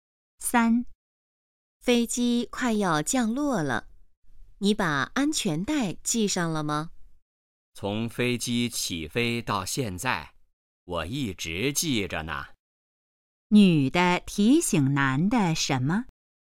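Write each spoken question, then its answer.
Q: 女的提醒男的什么?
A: 系上安全带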